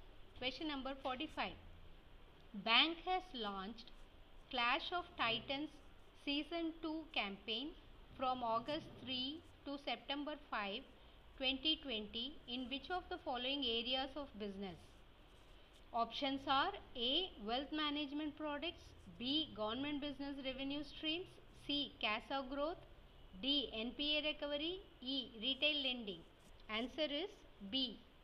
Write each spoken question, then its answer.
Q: Bank has launched Clash of Titans Season 2 campaign from August 3 to September 5, 2020 in which of the following areas of business?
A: Answer is B.